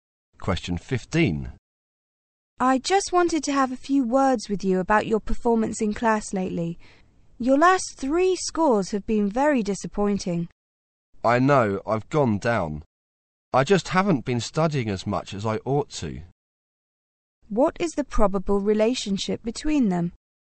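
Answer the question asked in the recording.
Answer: Teacher and student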